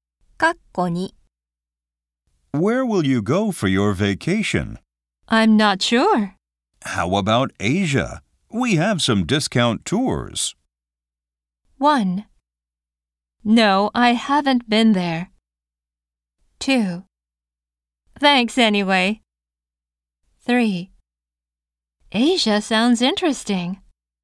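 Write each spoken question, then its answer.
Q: How about Asia? We have some discount tours.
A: 3: Asia sounds interesting.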